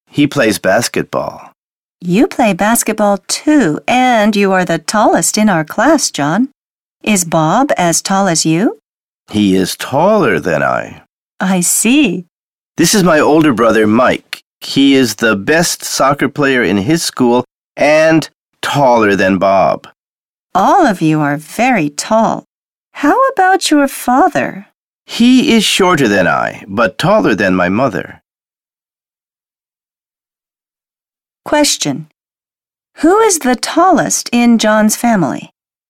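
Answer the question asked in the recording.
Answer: Mike, John's older brother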